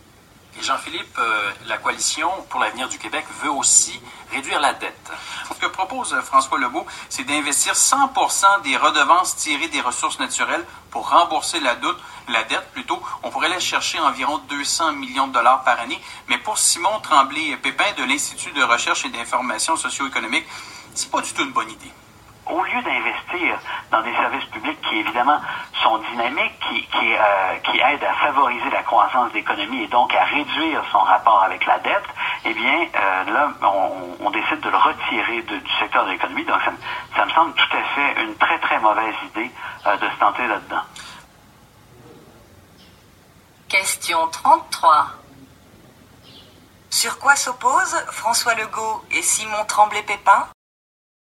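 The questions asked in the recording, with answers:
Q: Sur quoi s'opposent François Legault et Simon Tremblay-Pépin?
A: Sur l'usage des redevances des ressources naturelles pour rembourser la dette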